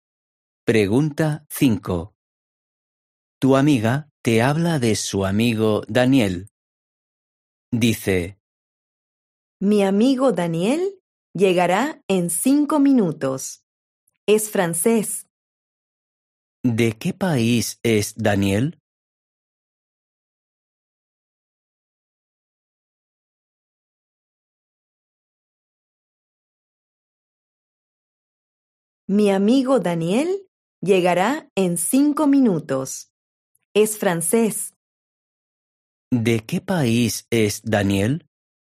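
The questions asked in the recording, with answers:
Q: ¿De qué país es Daniel?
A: Francia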